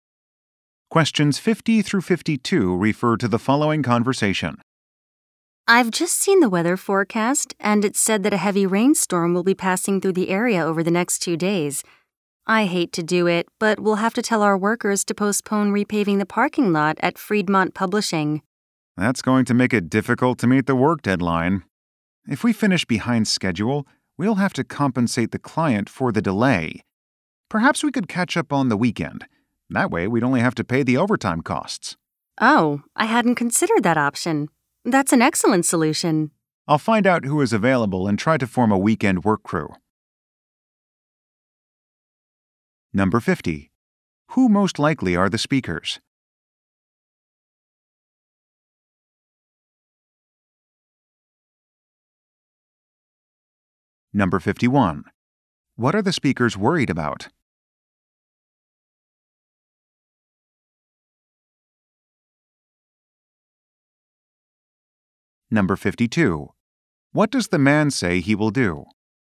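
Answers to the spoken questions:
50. Construction (paving) company workers
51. Missing the work deadline
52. Form a weekend work crew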